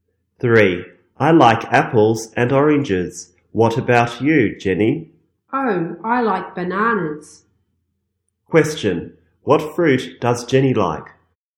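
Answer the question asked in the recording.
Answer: Bananas.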